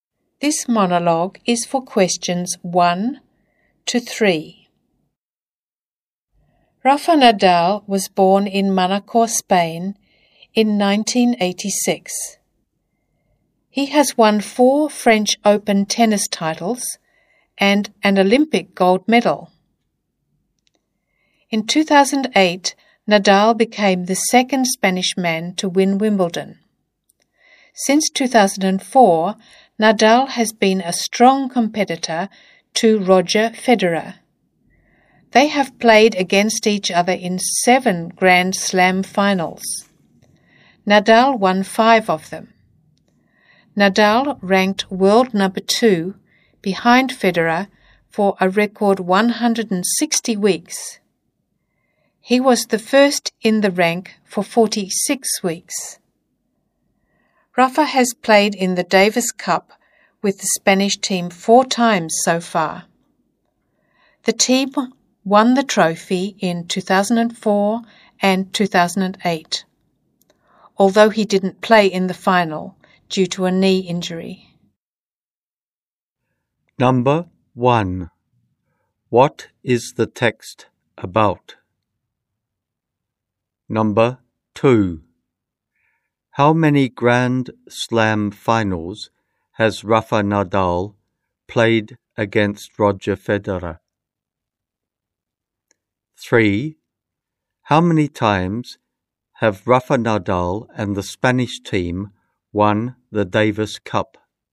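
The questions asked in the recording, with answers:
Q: What is the text about?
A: Rafa Nadal

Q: How many times have Rafa Nadal and the Spanish team won the Davis Cup?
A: Twice (2004 and 2008)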